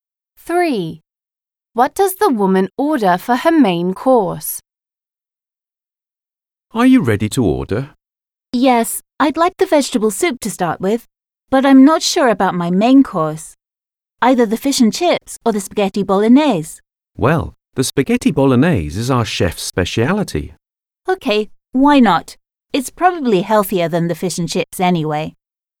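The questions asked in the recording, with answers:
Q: What does the woman order for her main course?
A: Spaghetti bolognese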